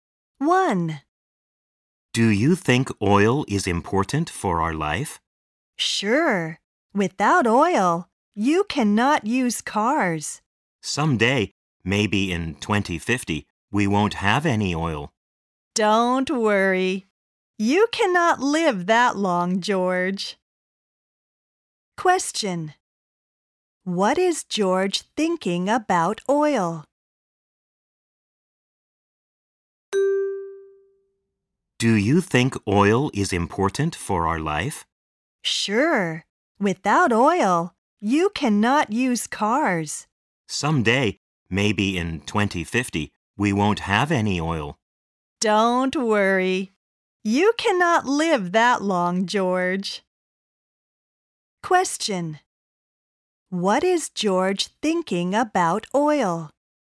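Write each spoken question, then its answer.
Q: What is George thinking about oil?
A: He is worried that we will run out of oil someday, maybe in 2050.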